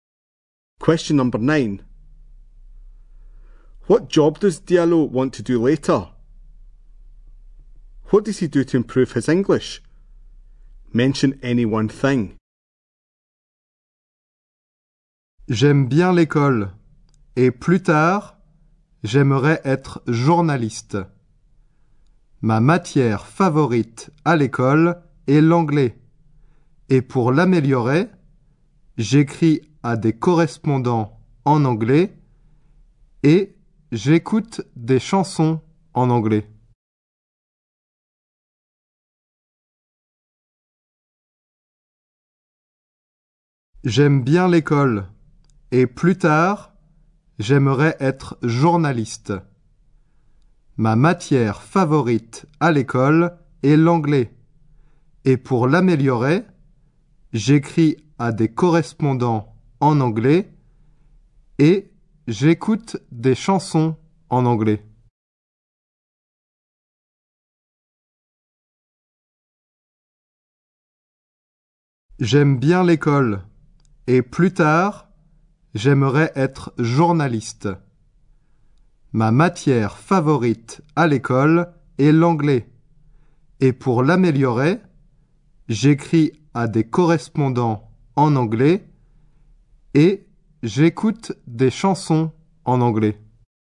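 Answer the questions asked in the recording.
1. Journalist
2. Writes to penfriends in English or listens to songs in English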